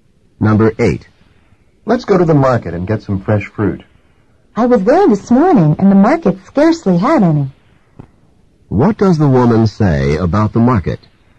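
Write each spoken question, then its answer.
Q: What does the woman say about the market?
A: It had almost no fresh fruit.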